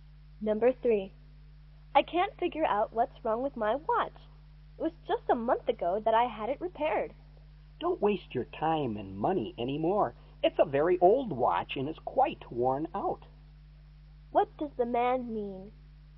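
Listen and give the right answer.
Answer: The woman should buy a new watch instead of repairing the old one.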